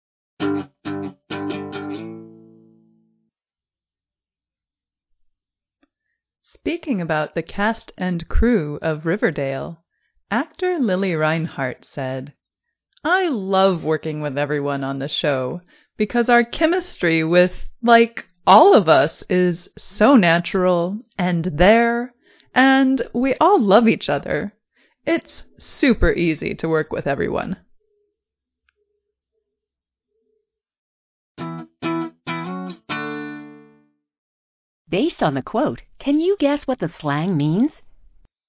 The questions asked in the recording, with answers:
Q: Based on the quote, can you guess what the slang means?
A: Chemistry is a noun meaning attraction, easy ability to enjoy a person's company.